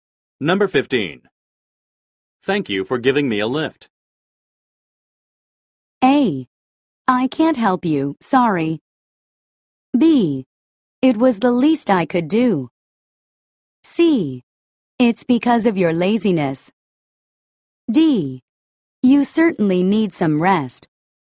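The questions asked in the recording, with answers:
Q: Thank you for giving me a lift.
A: B: It was the least I could do.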